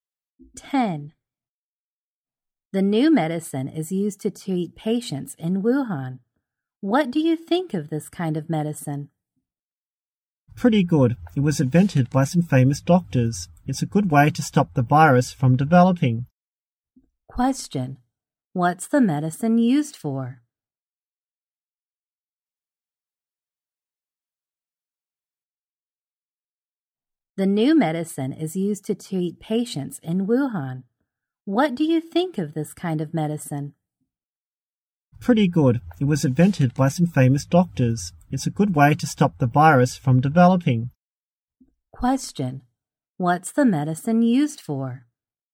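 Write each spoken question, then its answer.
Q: What's the medicine used for?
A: To treat patients and stop the virus from developing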